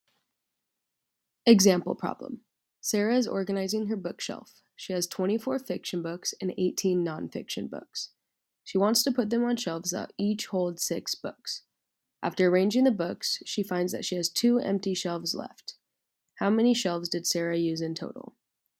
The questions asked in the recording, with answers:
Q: How many shelves did Sarah use in total?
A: Since 2 shelves are empty, total shelves used equals 7.